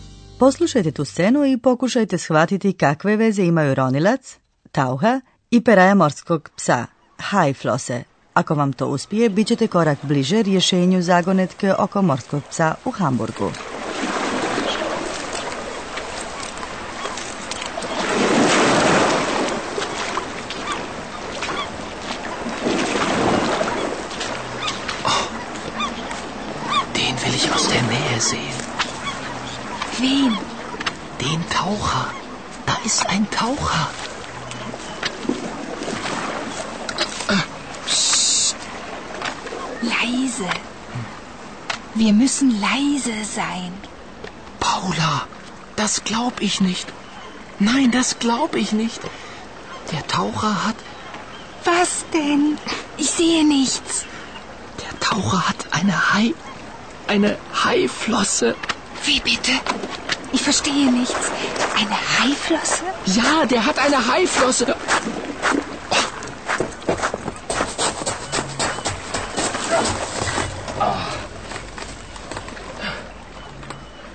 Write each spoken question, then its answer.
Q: Poslušajte tu scenu i pokušajte shvatiti kakve veze imaju ronilac, tauha i peraja morskog psa, hajflose.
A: Ronilac ima dakle peraju morskog psa.